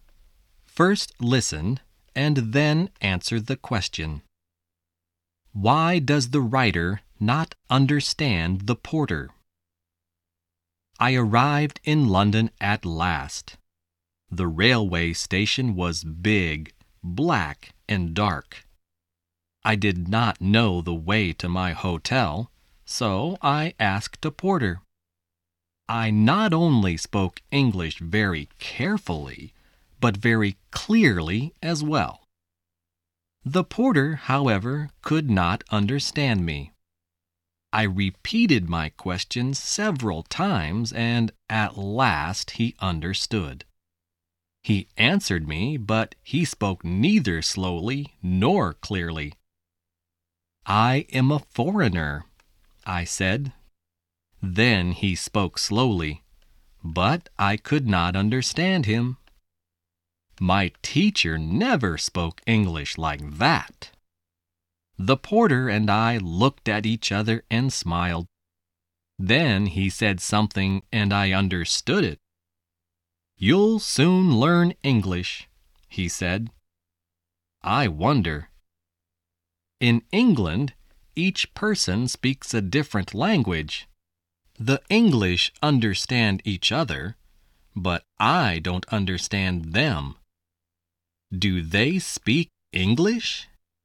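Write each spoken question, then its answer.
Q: Why does the writer not understand the porter?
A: Because the porter spoke neither slowly nor clearly, and even when he spoke slowly his English was not like the English the writer's teacher spoke.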